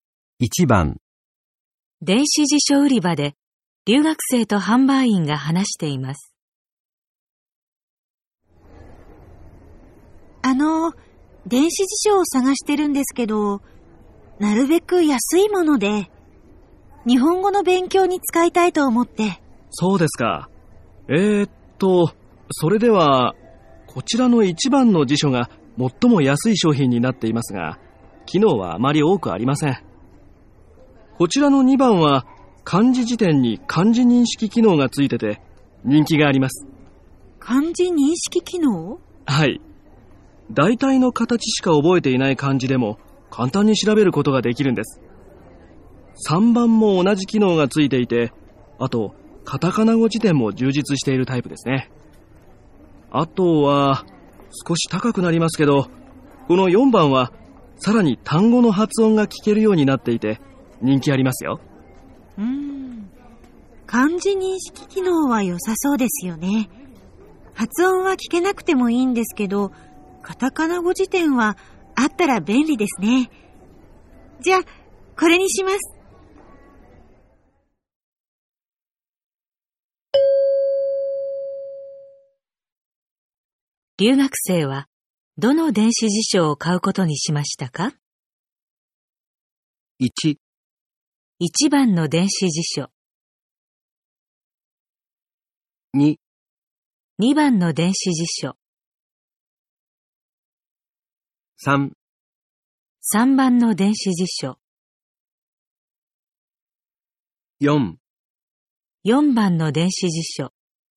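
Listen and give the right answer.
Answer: 3: 3番の電子辞書。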